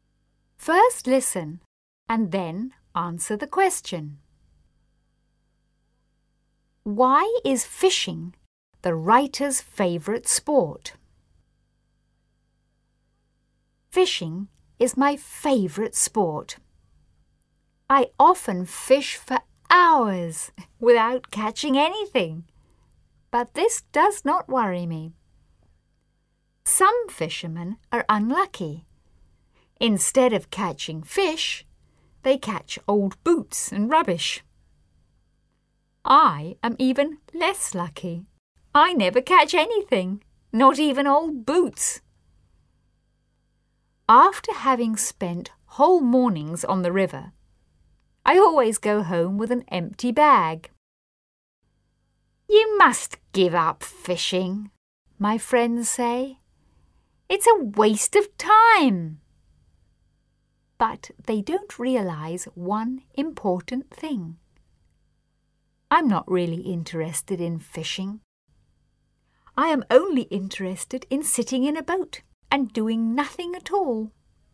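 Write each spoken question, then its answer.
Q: Why is fishing the writer's favourite sport?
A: Because he can sit in a boat and do nothing at all.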